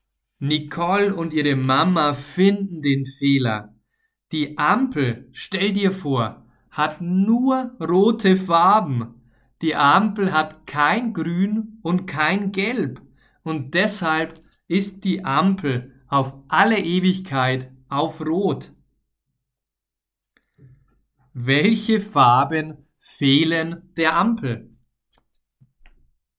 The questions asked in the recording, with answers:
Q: Welche Farben fehlen der Ampel?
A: Grün und Gelb.